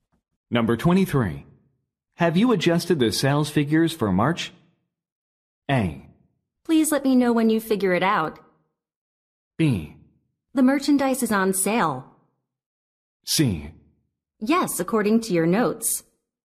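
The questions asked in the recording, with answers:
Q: Have you adjusted the sales figures for March?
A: C: Yes, according to your notes.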